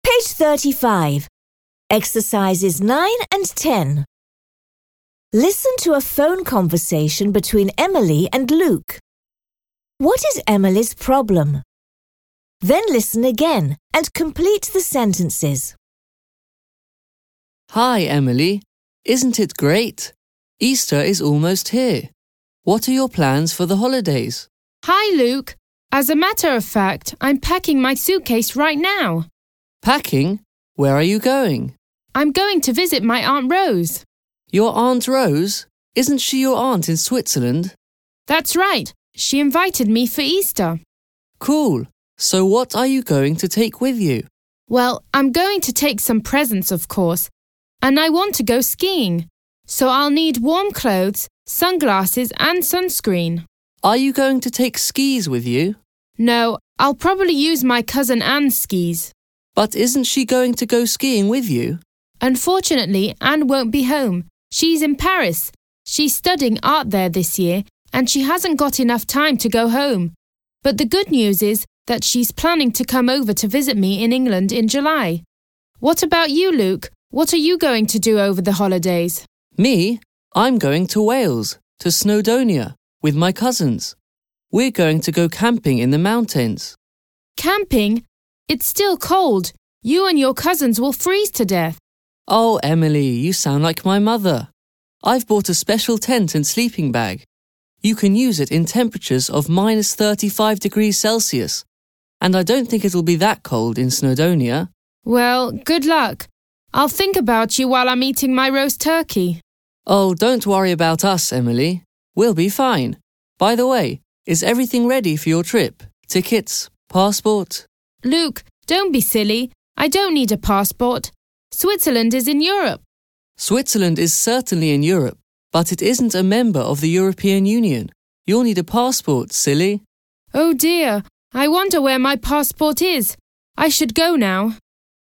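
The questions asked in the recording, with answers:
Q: What is Emily's problem?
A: She needs a passport for Switzerland but doesn't know where it is.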